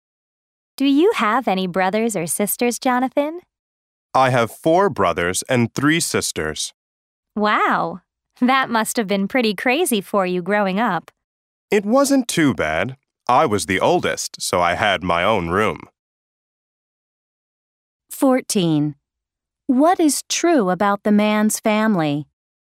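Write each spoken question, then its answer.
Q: What is true about the man's family?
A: He is the oldest of eight children (4 brothers and 3 sisters)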